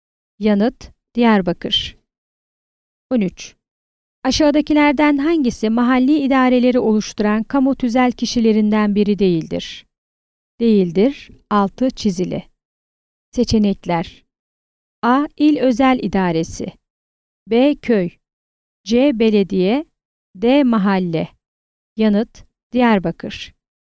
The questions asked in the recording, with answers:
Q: Aşağıdakilerden hangisi mahalli idareleri oluşturan kamu tüzel kişilerinden biri değildir?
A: Yanıt: Diyarbakır.